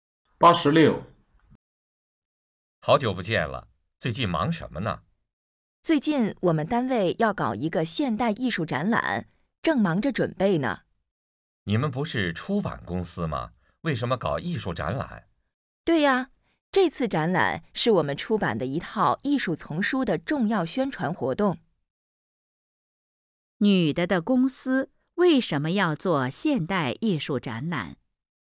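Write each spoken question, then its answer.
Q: 女的的公司为什么要做现代艺术展览?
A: 宣传公司出版的艺术丛书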